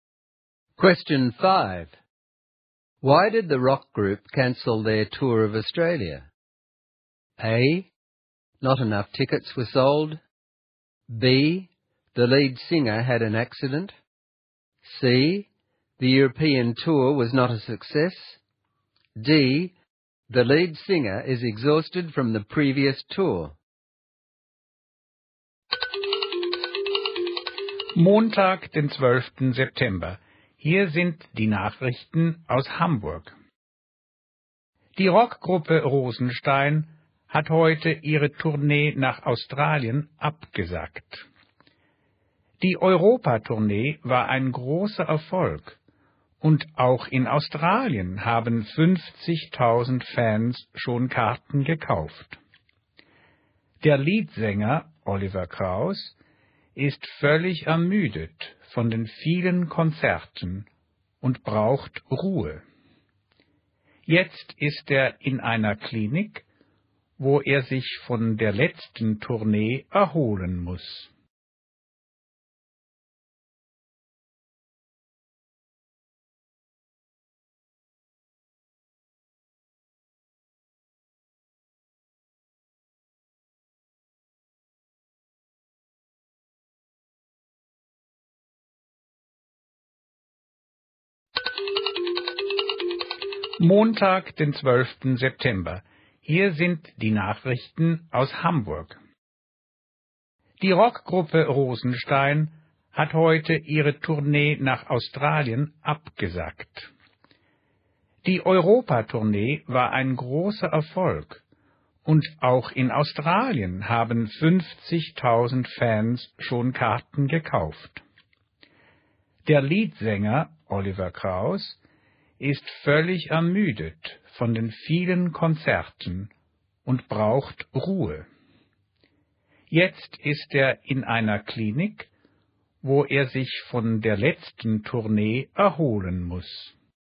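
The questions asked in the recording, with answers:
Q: Why did the rock group cancel their tour of Australia?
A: D: The lead singer is exhausted from the previous tour.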